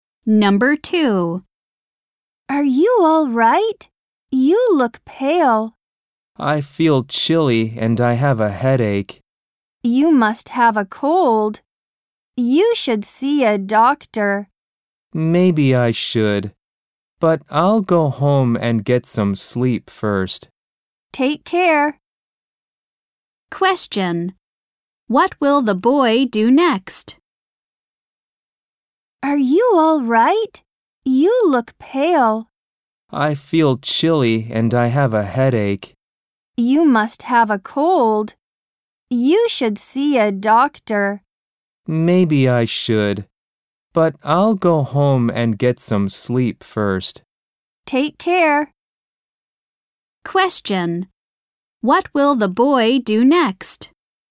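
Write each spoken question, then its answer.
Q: What will the boy do next?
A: Go home and get some sleep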